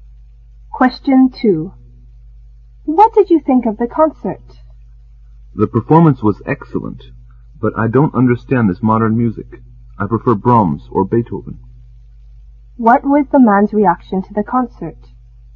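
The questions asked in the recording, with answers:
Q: What was the man's reaction to the concert?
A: He liked the performance but didn't understand the modern music; he prefers classical music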